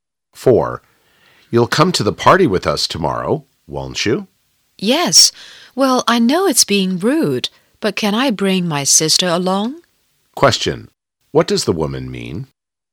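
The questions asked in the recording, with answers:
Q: What does the woman mean?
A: She will come and wants to bring her sister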